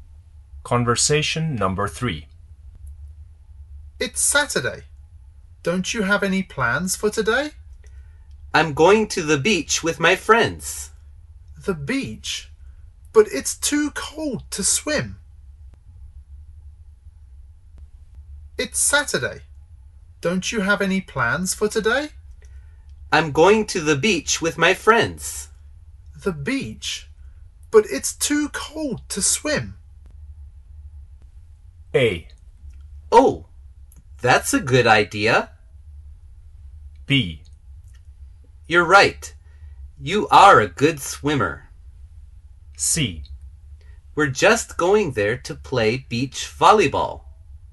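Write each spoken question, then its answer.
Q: The beach? But it's too cold to swim.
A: C: We're just going there to play beach volleyball.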